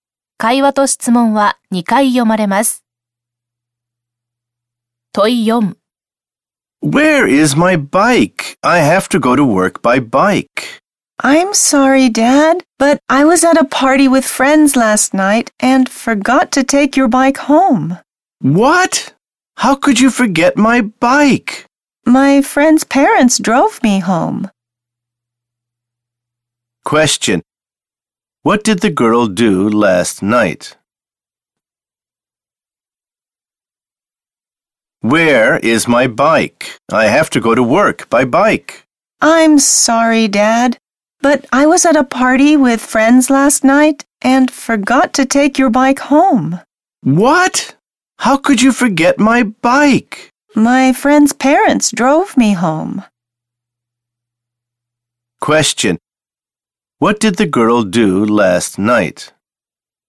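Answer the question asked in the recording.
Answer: She went to a party with friends and forgot to bring her dad's bike home.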